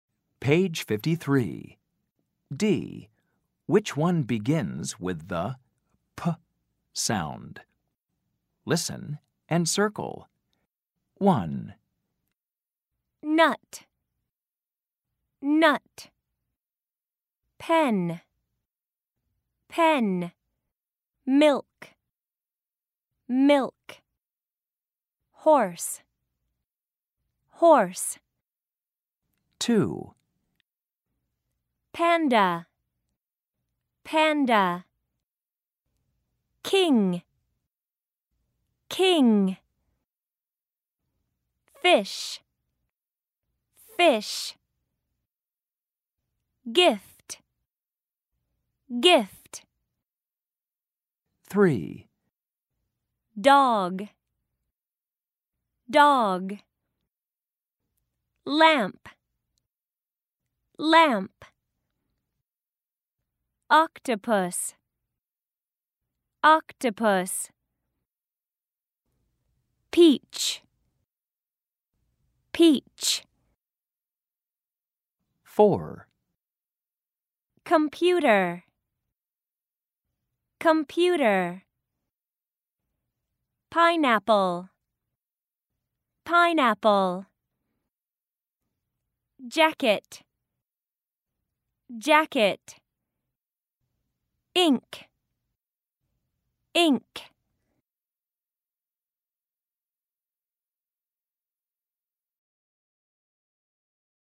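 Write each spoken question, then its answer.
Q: Which one begins with the P sound?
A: Pen

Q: Which one begins with the P sound?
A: Panda

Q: Which one begins with the P sound?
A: Peach

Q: Which one begins with the P sound?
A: Pineapple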